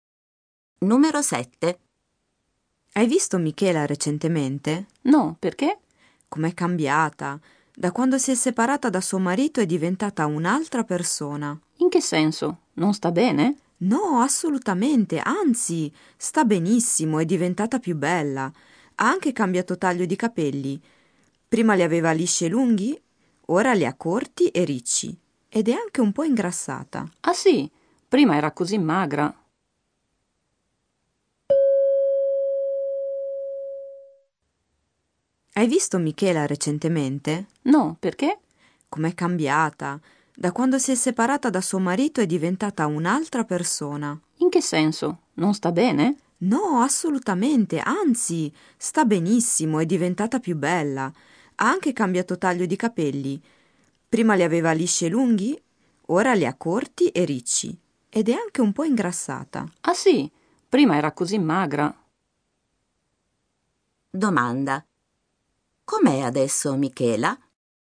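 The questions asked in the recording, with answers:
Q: Domanda. Com'è adesso Michela?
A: Più bella, con capelli corti e ricci, un po' ingrassata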